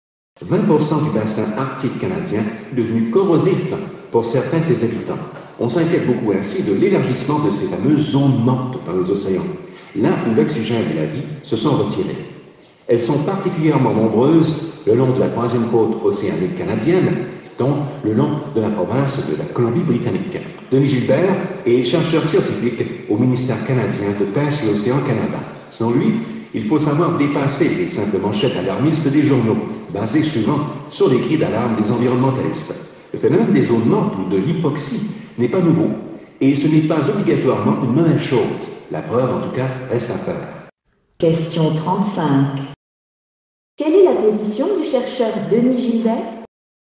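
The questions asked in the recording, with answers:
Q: Quelle est la position du chercheur Denis Gilbert?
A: Il est nuancé : il faut dépasser les manchettes alarmistes, les zones mortes ne sont pas nouvelles ni forcément une mauvaise chose.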